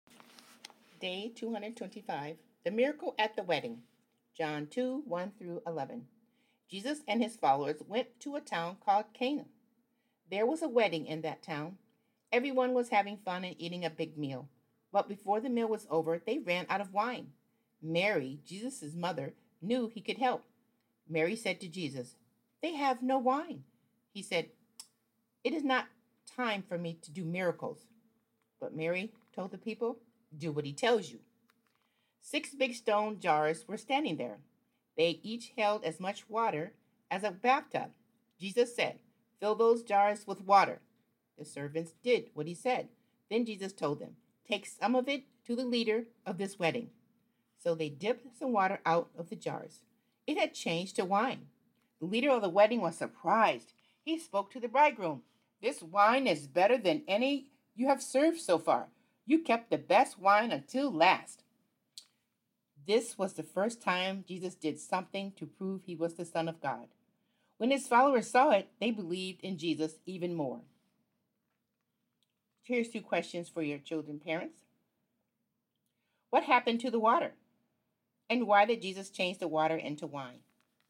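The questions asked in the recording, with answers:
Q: What happened to the water?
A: It changed to wine.

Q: And why did Jesus change the water into wine?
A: To prove he was the Son of God.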